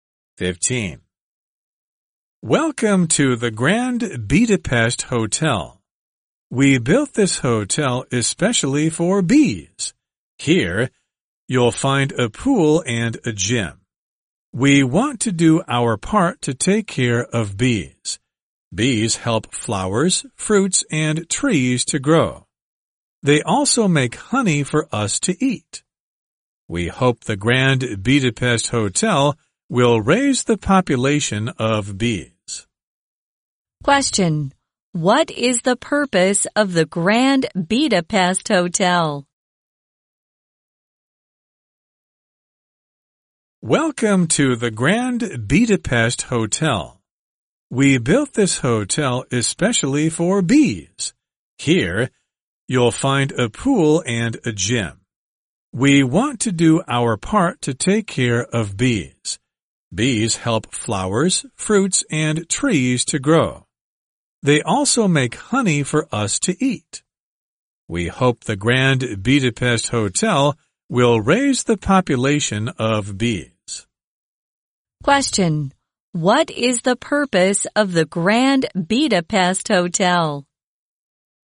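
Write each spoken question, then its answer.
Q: What is the purpose of the Grand Budapest Hotel?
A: To help raise the bee population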